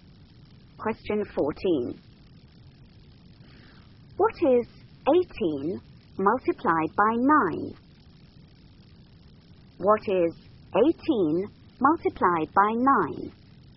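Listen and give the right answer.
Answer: 162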